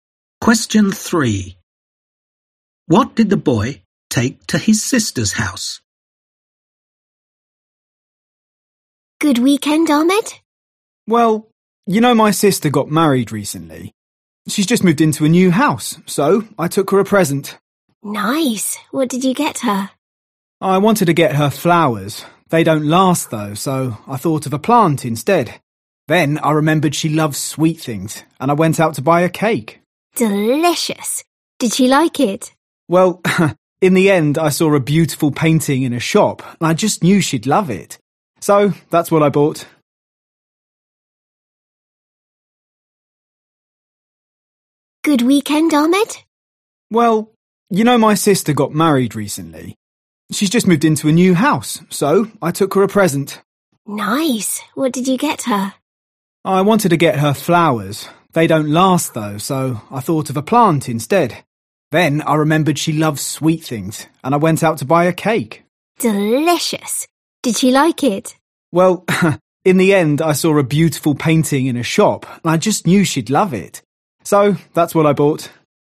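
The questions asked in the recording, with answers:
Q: What did the boy take to his sister's house?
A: a painting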